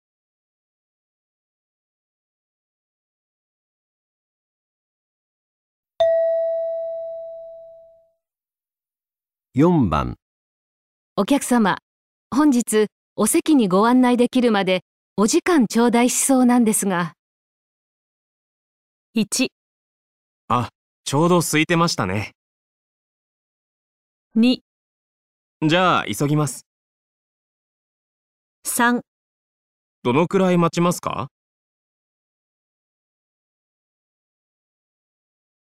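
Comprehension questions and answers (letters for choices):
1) お客様、 本日お席にご案内できるまで、お時間頂戴しそうなんですが。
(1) あ、ちょうど空いてましたね。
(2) じゃあ、急ぎます。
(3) どのくらい待ちますか?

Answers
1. 3

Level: 【N1 第1回】聴解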